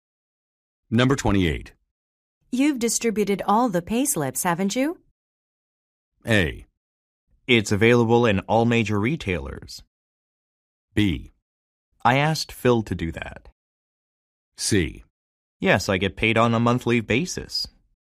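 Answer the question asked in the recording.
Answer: B: I asked Phil to do that.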